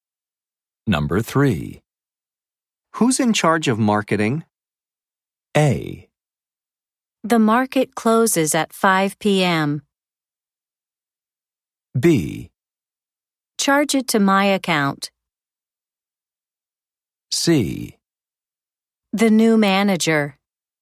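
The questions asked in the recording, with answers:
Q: Who's in charge of marketing?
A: C: The new manager.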